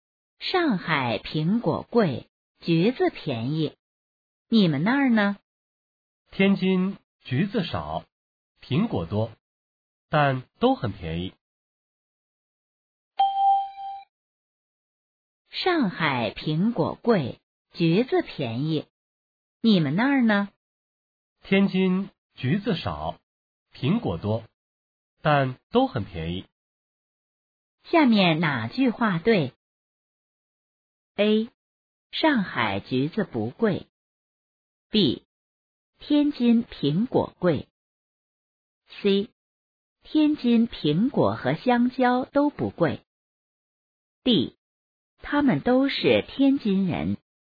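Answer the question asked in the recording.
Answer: A: 上海橘子不贵。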